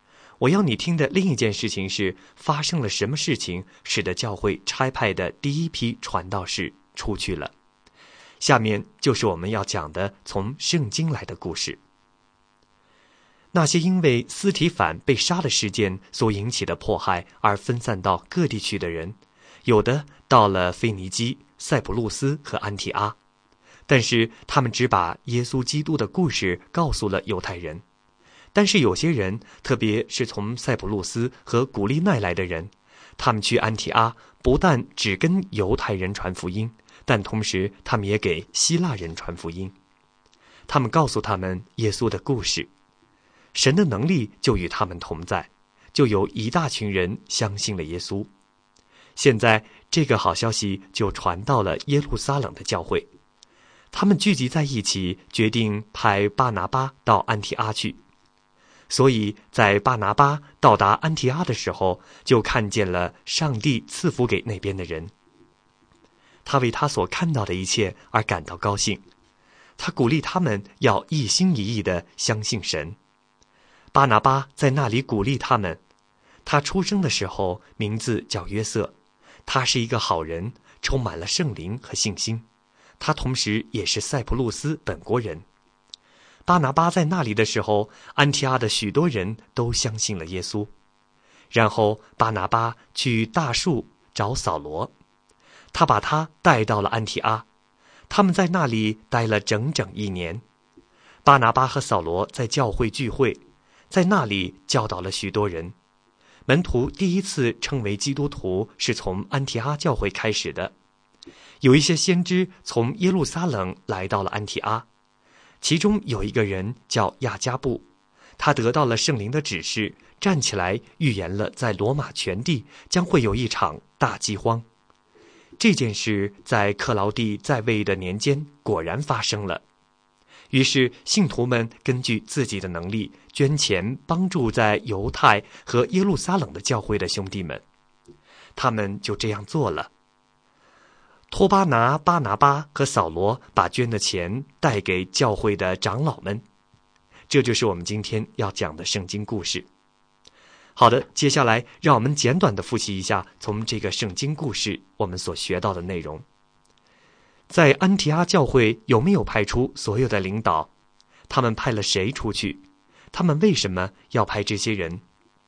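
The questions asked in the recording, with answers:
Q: 他们派了谁出去?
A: 巴拿巴和扫罗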